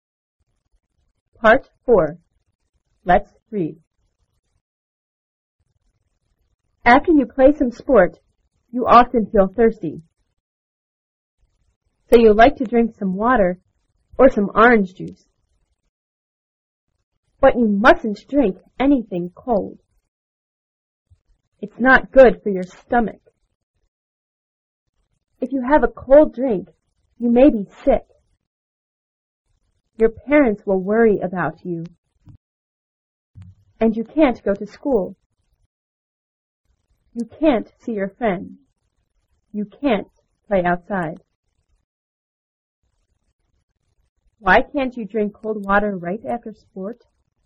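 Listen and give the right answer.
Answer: Because it's not good for your stomach and you may be sick.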